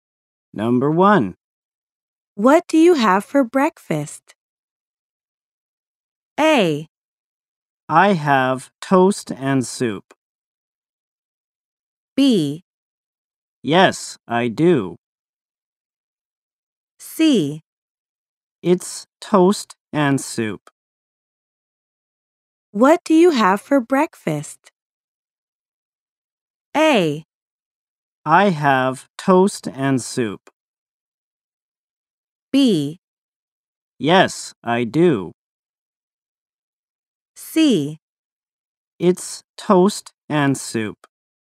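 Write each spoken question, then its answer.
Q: What do you have for breakfast?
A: A: I have toast and soup.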